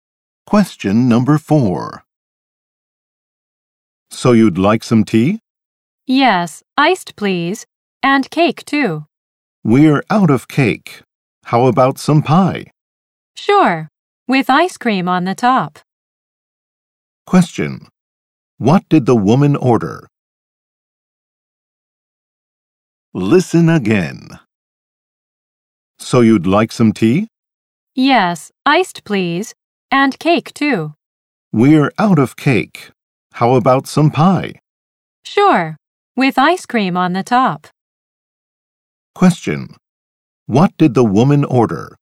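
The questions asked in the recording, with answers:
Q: What did the woman order?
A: Iced tea and pie with ice cream on top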